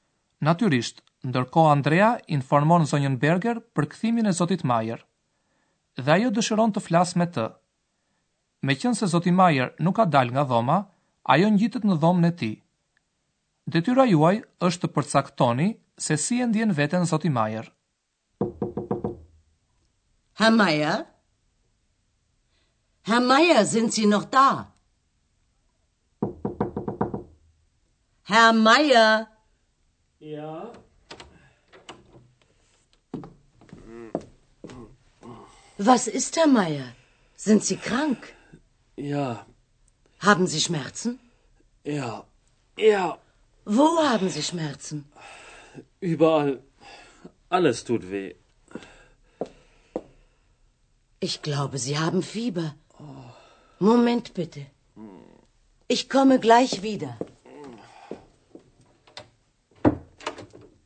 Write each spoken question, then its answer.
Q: Detyra juaj është të përcaktoni se si e ndjen veten Zoti Majer.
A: ju sigurisht e kuptuat se ai është i smurë